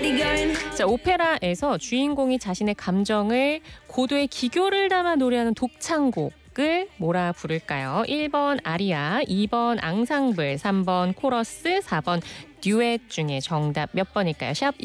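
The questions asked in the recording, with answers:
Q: 자, 오페라에서 주인공이 자신의 감정을 고도의 기교를 담아 노래하는 독창곡을 뭐라 부를까요?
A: 1번: 아리아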